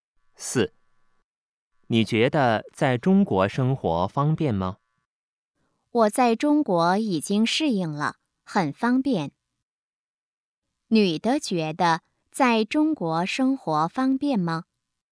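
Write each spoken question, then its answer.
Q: 女的觉得在中国生活方便吗?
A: 很方便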